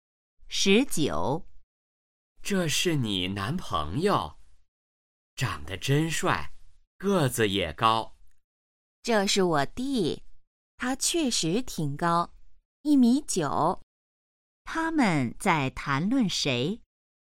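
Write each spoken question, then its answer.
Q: 他们在谈论谁?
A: 女的的弟弟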